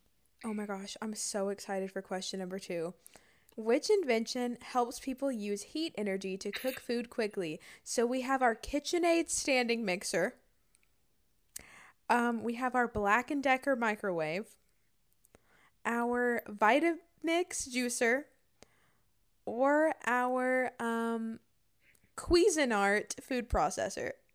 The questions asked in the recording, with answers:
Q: Which invention helps people use heat energy to cook food quickly?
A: But I think it's microwave.